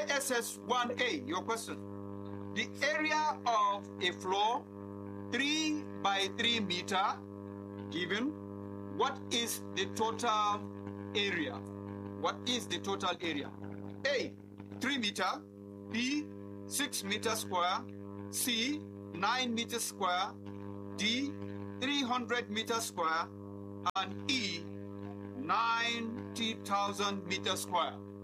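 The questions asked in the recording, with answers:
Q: What is the total area?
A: C: 9 meter square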